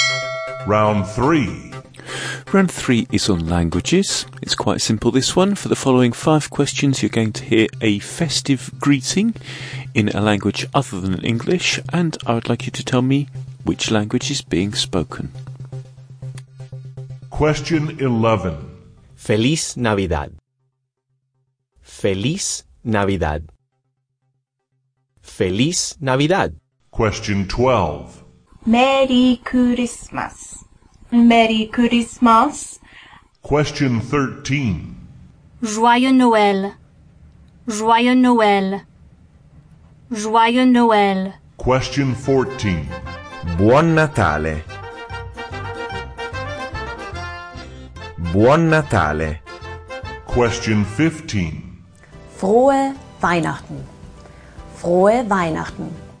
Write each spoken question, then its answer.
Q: I would like you to tell me which language is being spoken.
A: the answer to number 11 was Spanish

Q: I would like you to tell me which language is being spoken.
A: Number 13, French.

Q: I would like you to tell me which language is being spoken.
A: Number 14 was Italian.

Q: I would like you to tell me which language is being spoken.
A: And number 15, German.